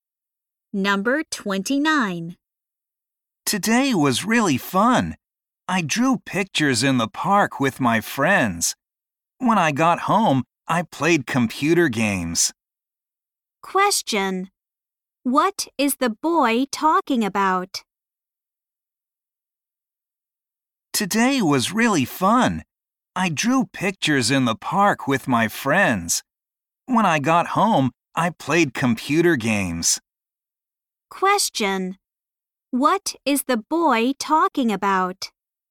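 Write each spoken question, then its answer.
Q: What is the boy talking about?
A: His day (drawing pictures in the park and playing computer games)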